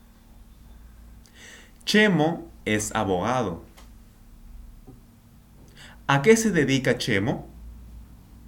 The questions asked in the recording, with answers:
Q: ¿A qué se dedica Chemo?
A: Chemo es abogado, él es abogado.